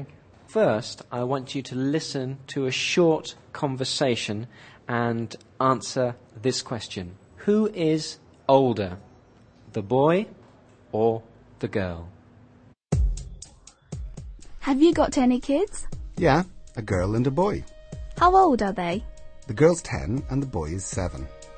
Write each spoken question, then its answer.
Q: Who is older, the boy or the girl?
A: The girl is older. The girl is 10, but the boy is 7.